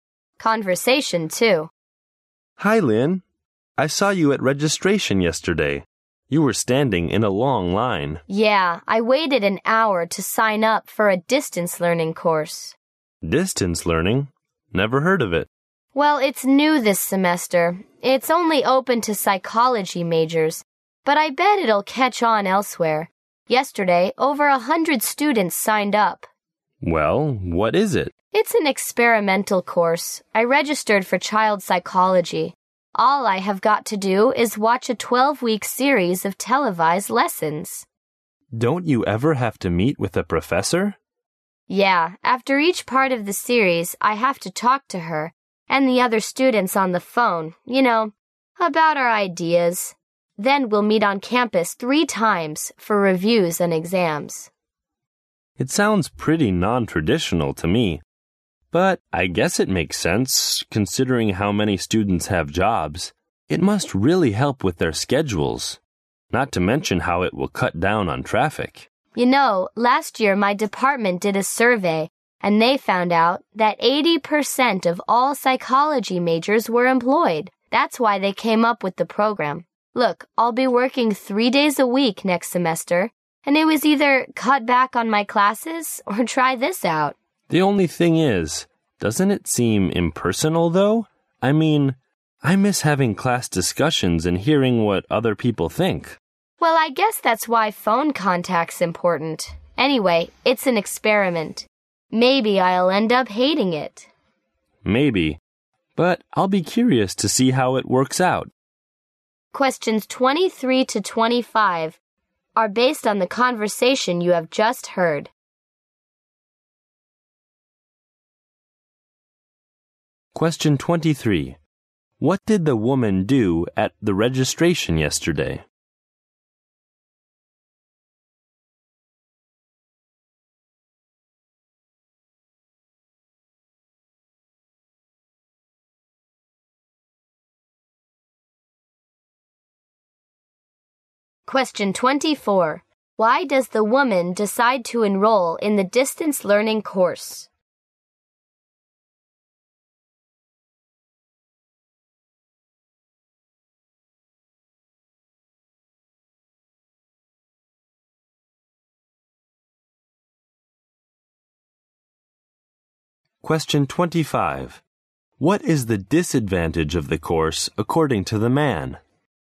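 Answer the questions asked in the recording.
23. She signed up for a distance learning course
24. She will be working 3 days a week next semester
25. It seems impersonal, with no class discussions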